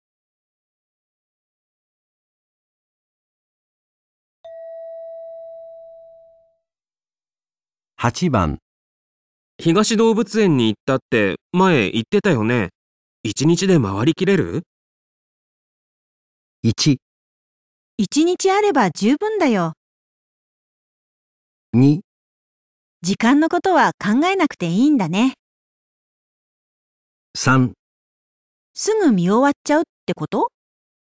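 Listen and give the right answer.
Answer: 一日あれば十分だよ。

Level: N2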